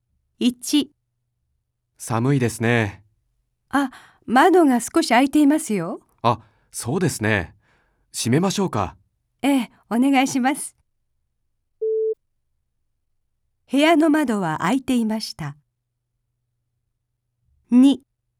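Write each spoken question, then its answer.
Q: 部屋の窓は開いていました。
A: 正しい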